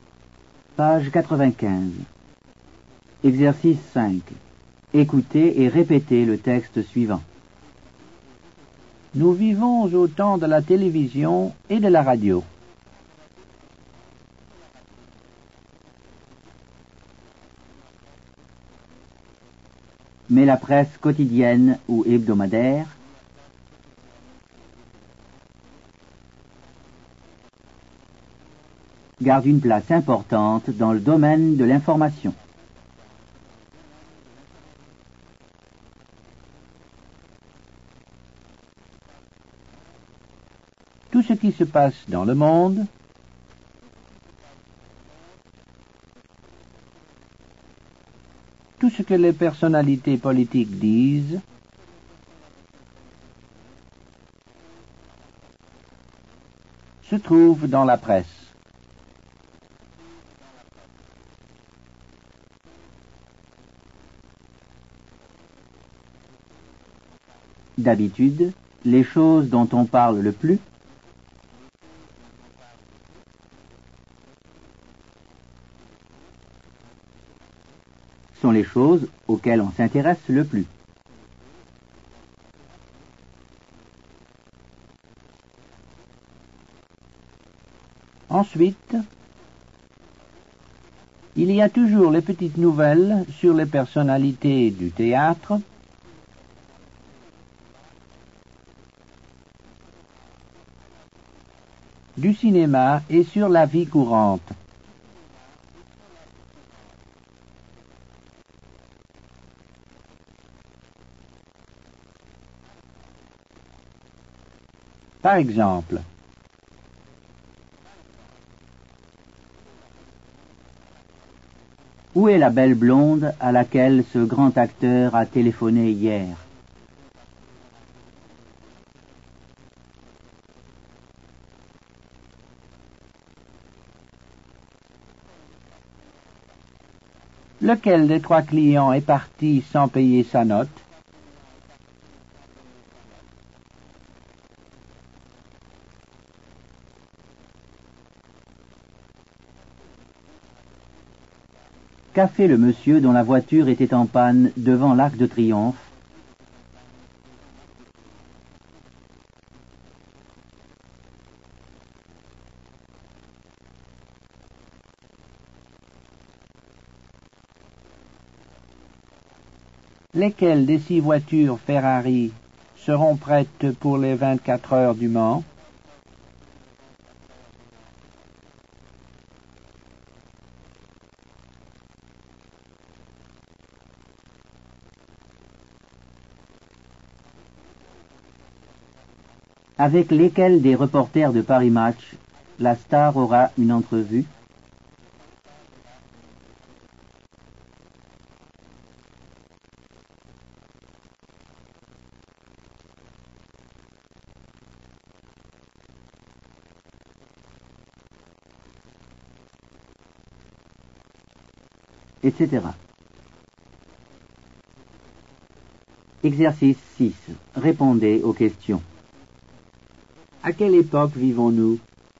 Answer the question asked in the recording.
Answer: Nous vivons au temps de la télévision et de la radio.